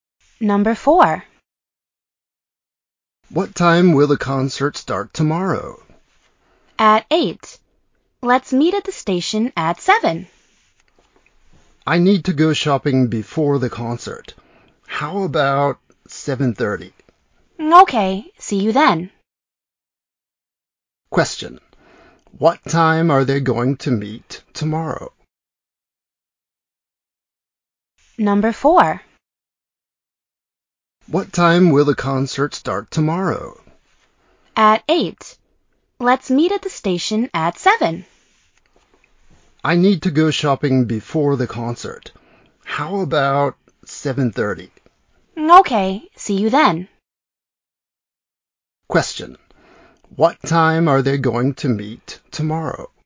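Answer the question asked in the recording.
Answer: At 7:30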